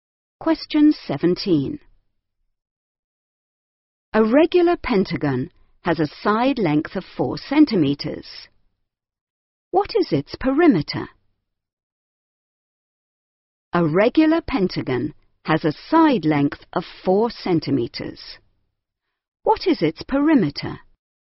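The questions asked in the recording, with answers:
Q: What is its perimeter?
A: 20 centimetres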